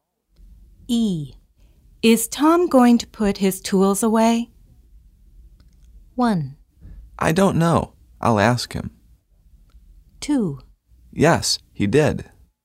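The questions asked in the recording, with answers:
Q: Is Tom going to put his tools away?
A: 1: I don't know. I'll ask him.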